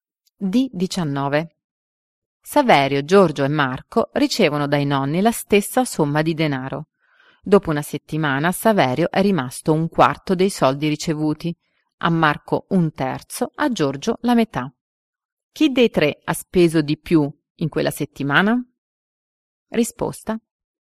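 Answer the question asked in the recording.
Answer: Saverio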